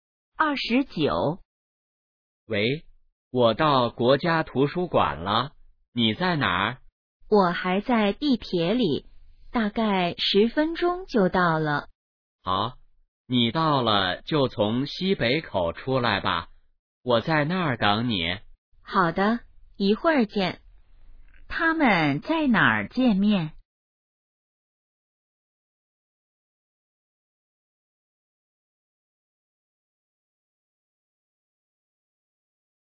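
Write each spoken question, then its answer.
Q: 他们在哪儿见面?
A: 国家图书馆西北口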